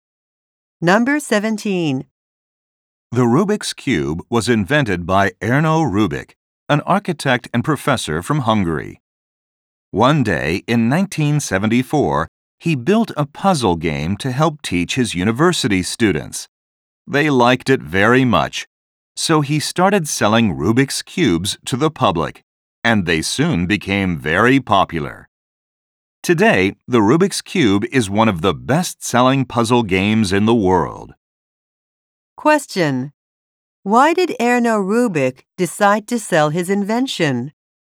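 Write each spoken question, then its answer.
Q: Why did Erno Rubik decide to sell his invention?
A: His university students liked it very much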